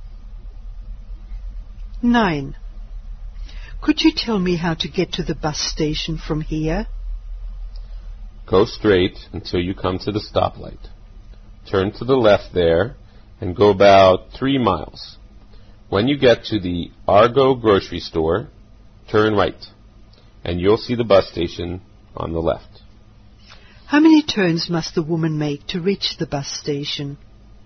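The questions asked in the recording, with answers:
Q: How many turns must the woman make to reach the bus station?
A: Two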